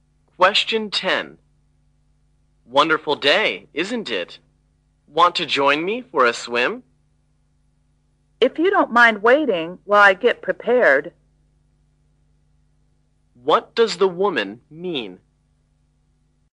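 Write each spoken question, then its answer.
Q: What does the woman mean?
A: She will go swimming with him if he waits while she gets ready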